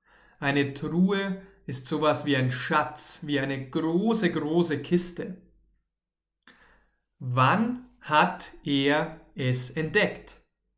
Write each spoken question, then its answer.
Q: Wann hat er es entdeckt?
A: Gestern.